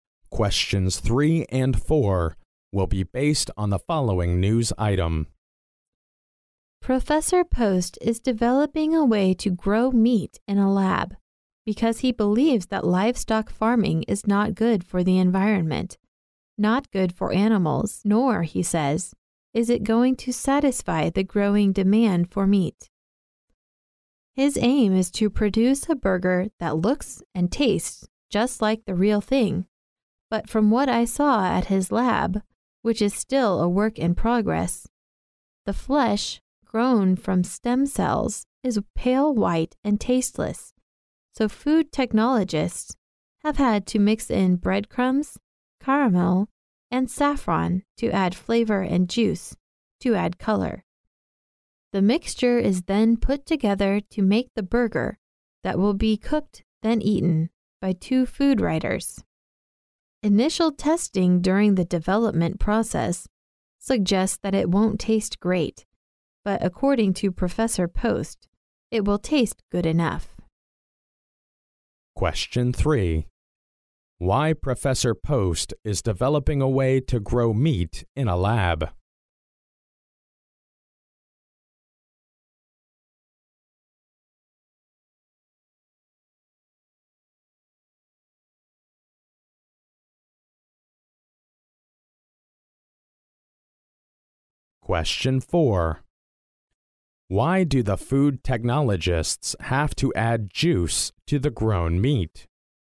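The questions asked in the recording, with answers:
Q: Why Professor Post is developing a way to grow meat in a lab?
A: Because livestock farming is bad for the environment and for animals, and won't satisfy the growing demand for meat

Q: Why do the food technologists have to add juice to the grown meat?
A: To add color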